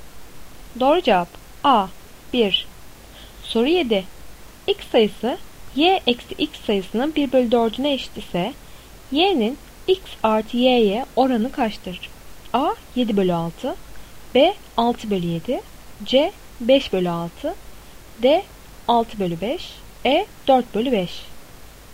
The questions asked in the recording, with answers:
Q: X sayısı Y eksi X sayısının 1 bölü 4'üne eşit ise Y'nin X artı Y'ye oranı kaçtır?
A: Doğru cevap C 5 bölü 6.